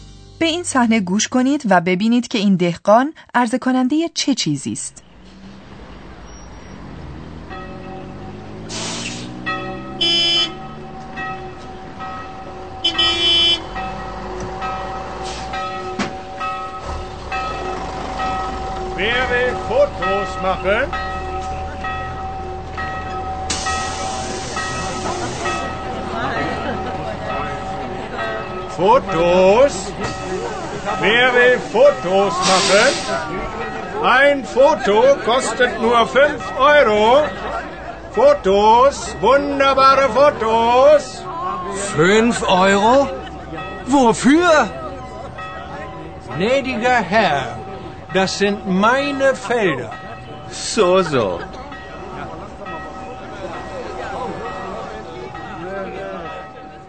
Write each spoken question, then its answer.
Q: به این صحنه گوش کنید و ببینید که این دهقان عرضه کننده چه چیزی است.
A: این دهقان امکان عکس برداری از این دایره‌های اسرارآمیز را برای گردشگران فراهم آورده و ماهرانه از آنان می‌پرسد که چه کسی مایل است عکس بگیرد.